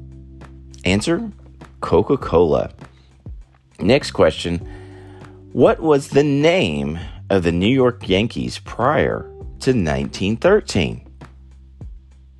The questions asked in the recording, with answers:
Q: What was the name of the New York Yankees prior to 1913?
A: Prior to 1913, the New York Yankees were known as the New York Highlanders.